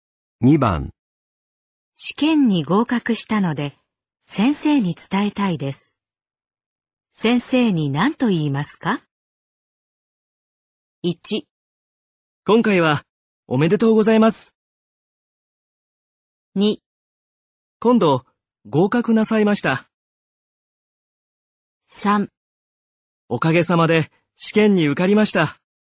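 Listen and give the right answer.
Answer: 3: おかげさまで試験に受かりました。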